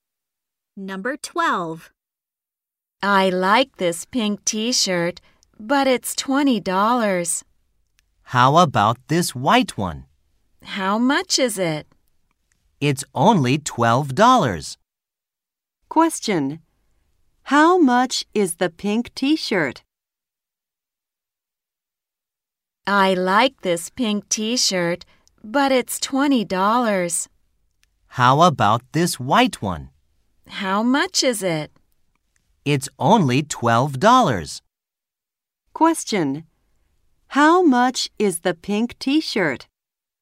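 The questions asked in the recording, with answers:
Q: Question. How much is the pink t-shirt?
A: $20.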